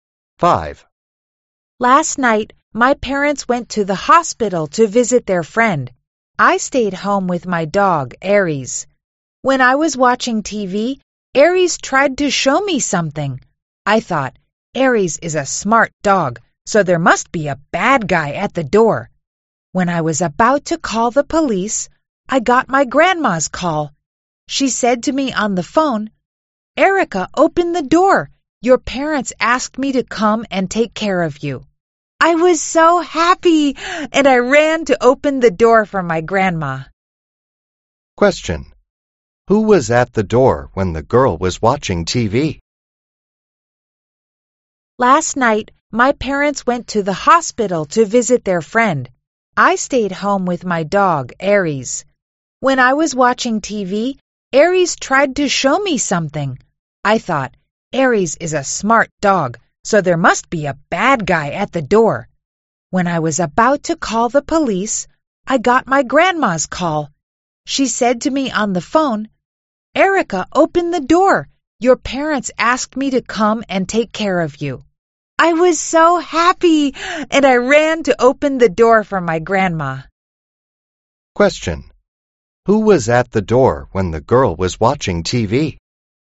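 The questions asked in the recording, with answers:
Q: Question. Who was at the door when the girl was watching TV?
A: Her grandma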